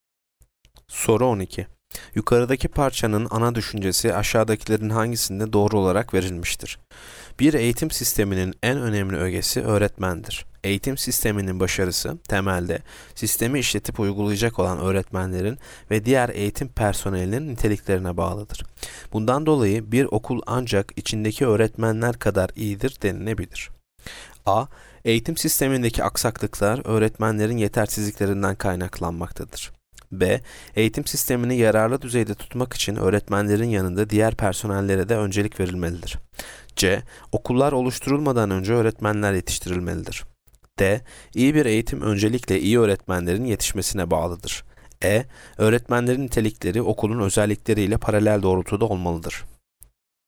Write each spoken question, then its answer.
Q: Yukarıdaki parçanın ana düşüncesi aşağıdakilerin hangisinde doğru olarak verilmiştir?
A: Yanıt D. İyi bir eğitim öncelikle iyi öğretmenlerin yetişmesine bağlıdır.